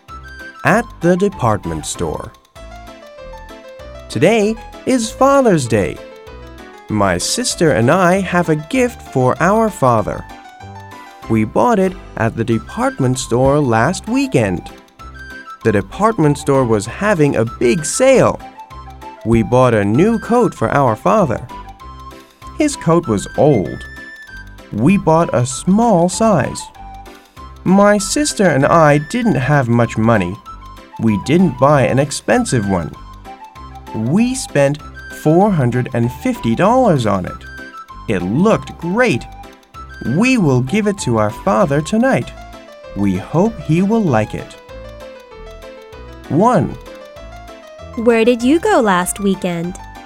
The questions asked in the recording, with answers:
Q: Where did you go last weekend?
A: We went to the department store last weekend.